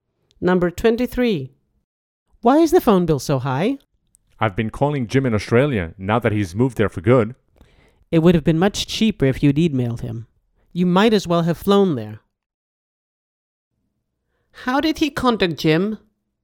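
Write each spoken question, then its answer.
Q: How did he contact Jim?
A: By phone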